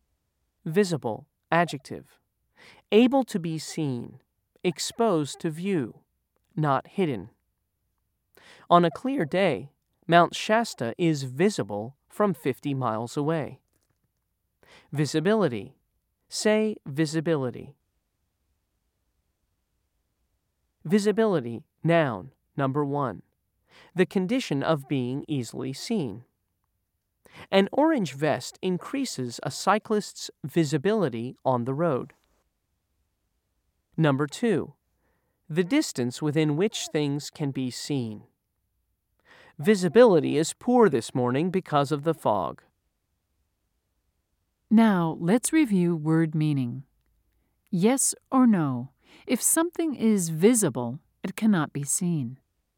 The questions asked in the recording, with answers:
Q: Yes or no? If something is visible, it cannot be seen.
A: If you said no, you were right.